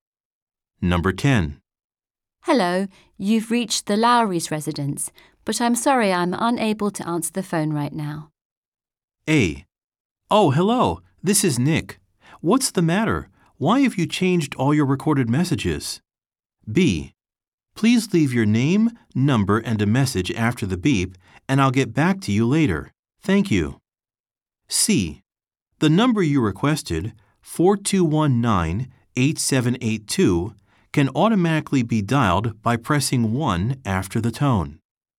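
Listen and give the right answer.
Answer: B: Please leave your name, number, and a message after the beep, and I'll get back to you later.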